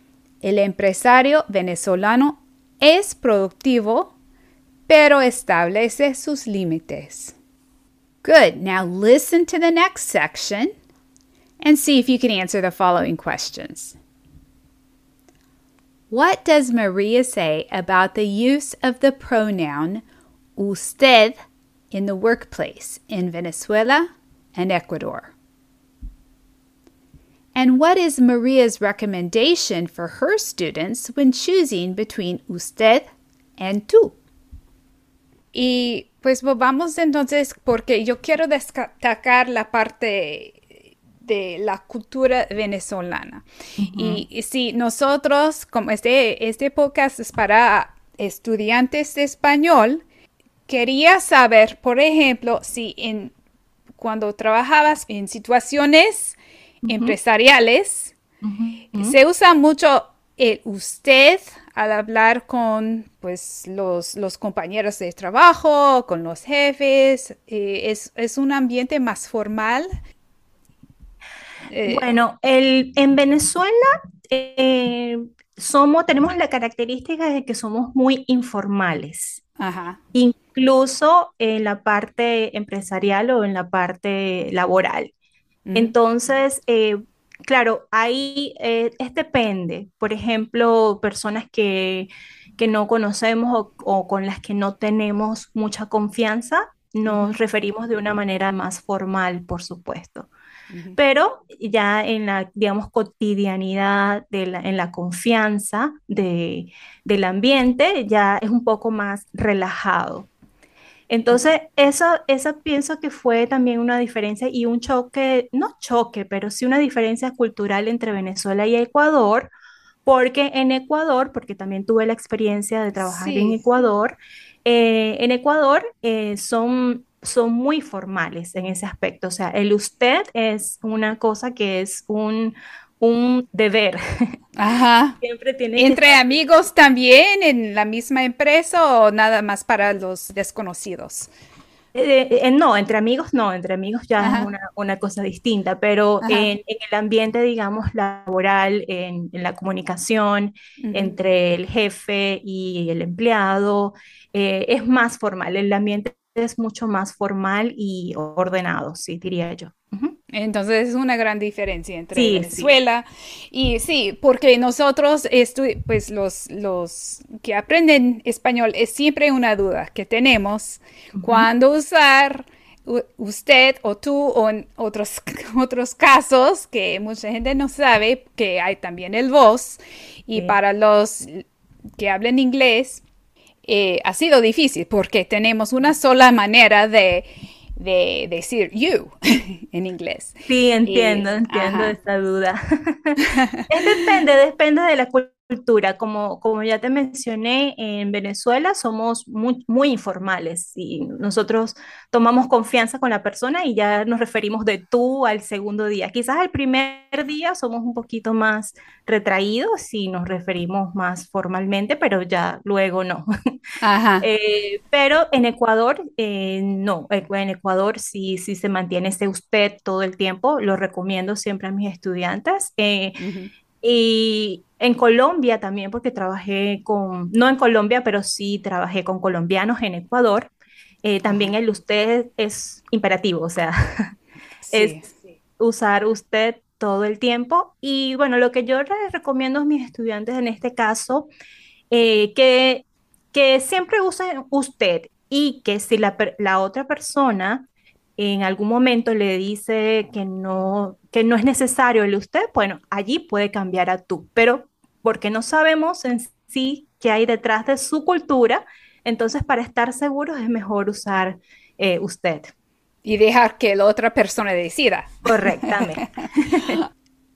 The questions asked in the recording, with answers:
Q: What does Maria say about the use of the pronoun usted in the workplace in Venezuela and Ecuador?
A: En su experiencia, María dice que en Venezuela se tiende a usar más el tú en el trabajo.

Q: And what is Maria's recommendation for her students when choosing between usted and tú?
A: María recomienda siempre hablar primero de usted y dejar que la otra persona decida si quiere cambiar el nivel de formalidad.